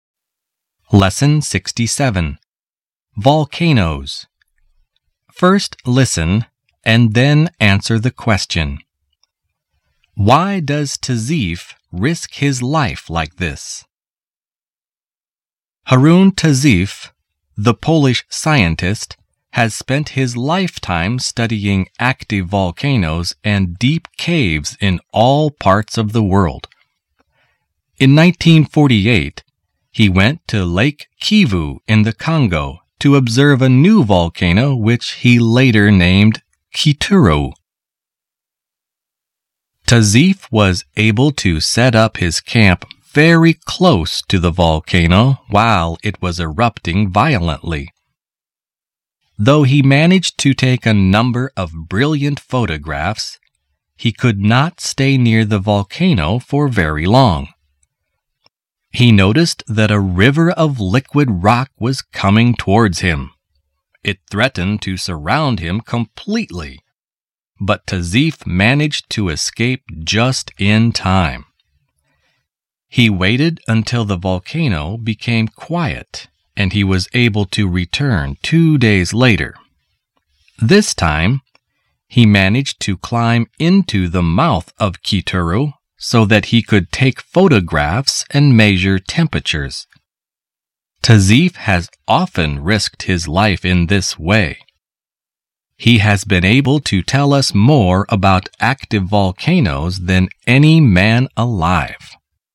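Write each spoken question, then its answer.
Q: Why does Tazeef risk his life like this?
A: To study active volcanoes so he can tell us more about them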